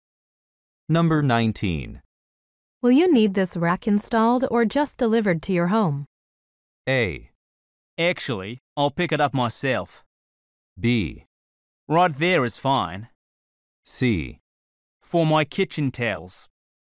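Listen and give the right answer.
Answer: A: Actually, I'll pick it up myself.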